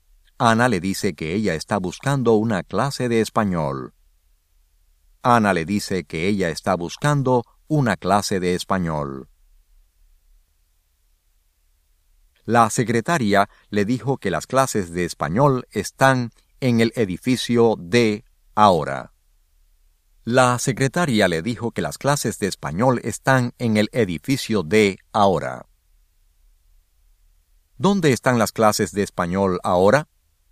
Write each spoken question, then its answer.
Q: ¿Dónde están las clases de español ahora?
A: Las clases de español están en el edificio D ahora.